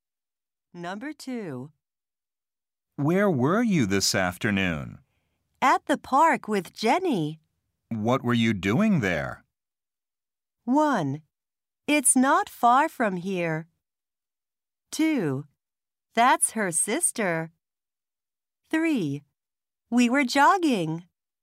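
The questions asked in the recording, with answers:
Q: What were you doing there?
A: 3: We were jogging.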